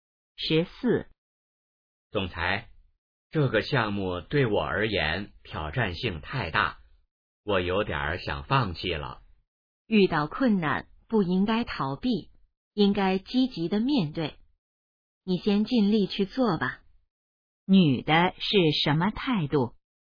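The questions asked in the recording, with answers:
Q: 女的是什么态度?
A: 鼓励他积极面对困难,不要放弃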